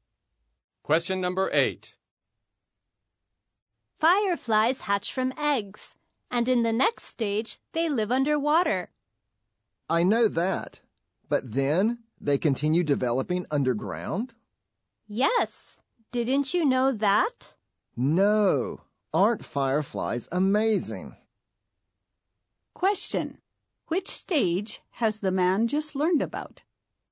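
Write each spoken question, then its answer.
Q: Which stage has the man just learned about?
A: The stage when they develop underground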